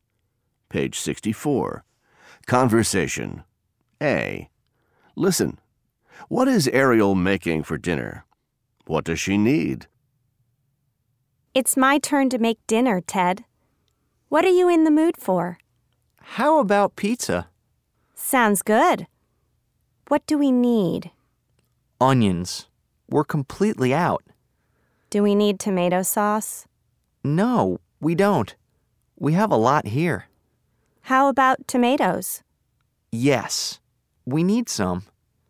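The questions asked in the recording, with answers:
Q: What is Ariel making for dinner?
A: Pizza

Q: What does she need?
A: Onions and tomatoes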